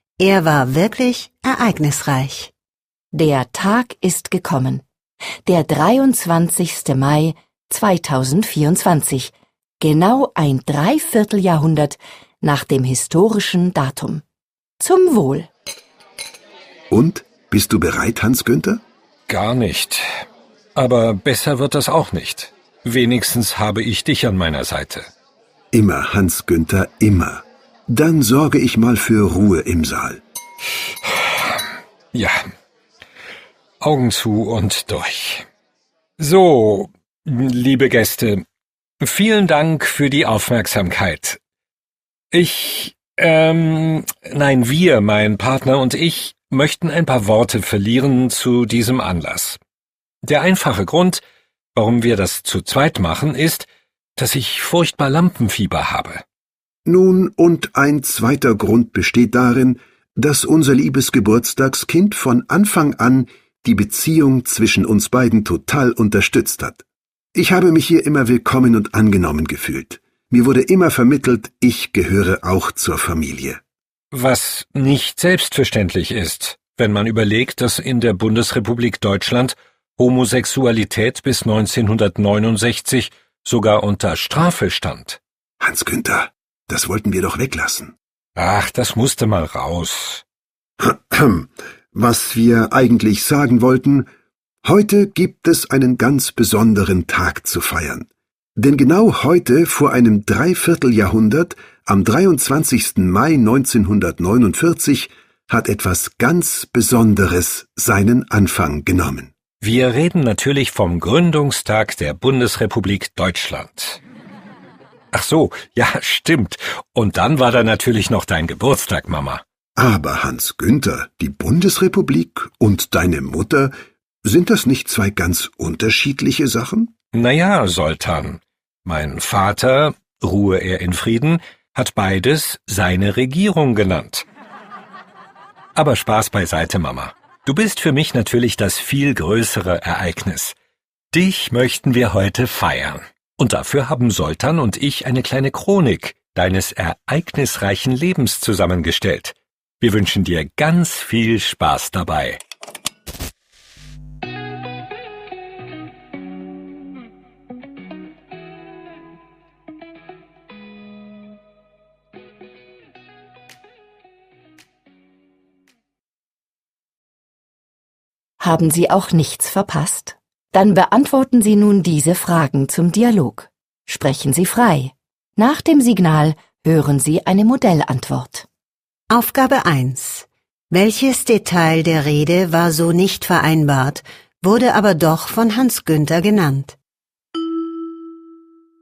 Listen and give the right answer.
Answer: In der Bundesrepublik Deutschland stand Homosexualität bis 1969 unter Strafe.